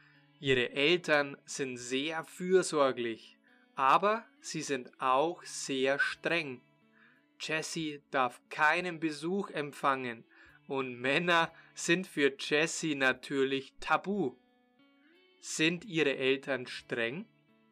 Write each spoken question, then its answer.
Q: Sind Ihre Eltern streng?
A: Ja, genau. Sie sind sehr streng.